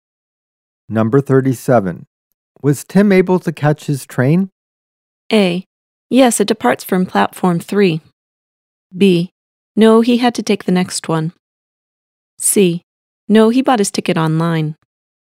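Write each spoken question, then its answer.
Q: Was Tim able to catch his train?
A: B: No, he had to take the next one.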